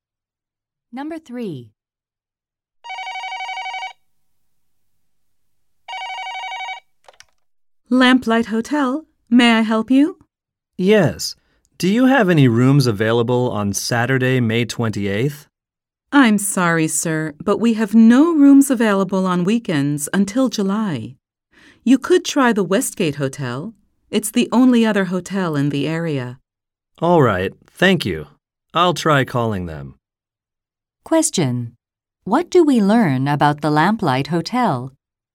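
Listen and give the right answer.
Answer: It has no rooms available on weekends until July.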